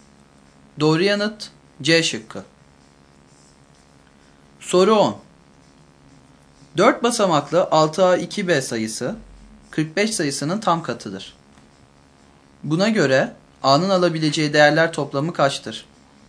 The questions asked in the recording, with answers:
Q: Buna göre A'nın alabileceği değerler toplamı kaçtır?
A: Doğru yanıt D şıkkıdır.